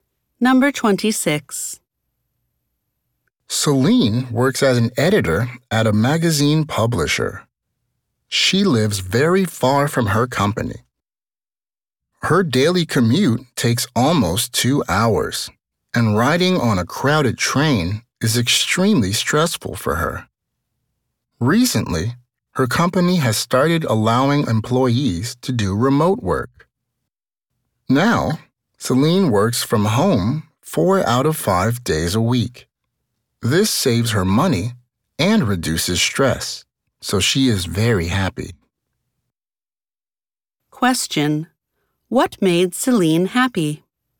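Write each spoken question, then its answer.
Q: What made Celine happy?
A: Her company began allowing remote work, so she now works from home four days a week, saving money and reducing stress.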